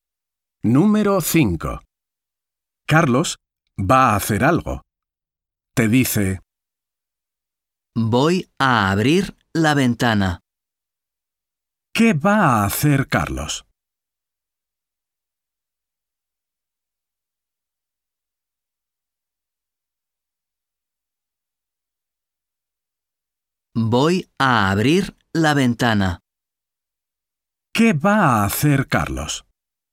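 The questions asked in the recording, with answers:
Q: ¿Qué va a hacer Carlos?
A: abrir la ventana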